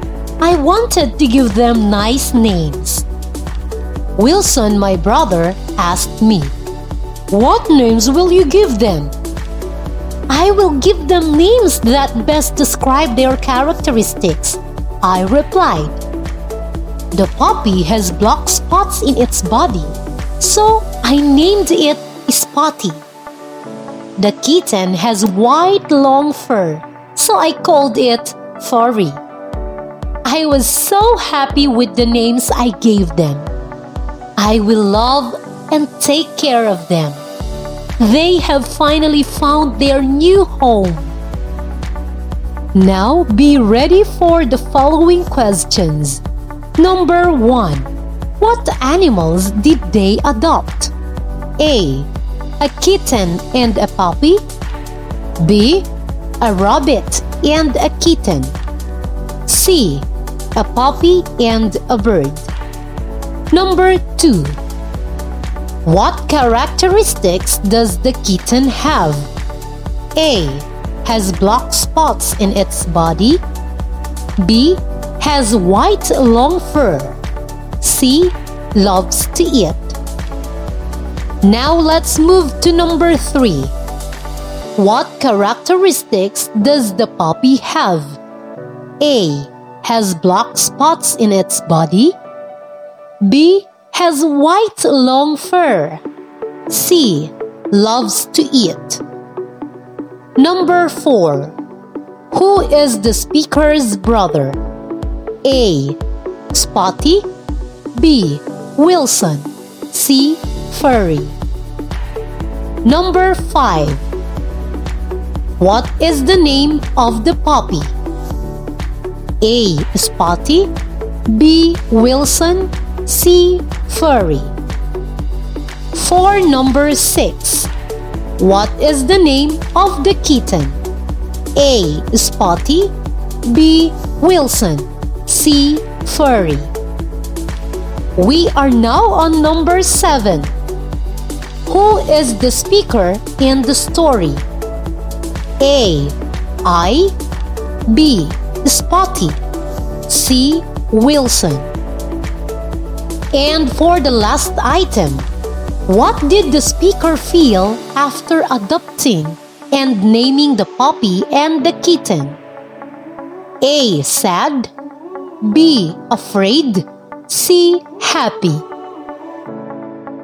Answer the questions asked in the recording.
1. Number 1. Letter A.
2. Letter B.
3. Number 3. Letter A.
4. Number 4. Letter B.
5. Letter A.
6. Number 6. Letter C.
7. Number 7. Letter A.
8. And number 8, letter C.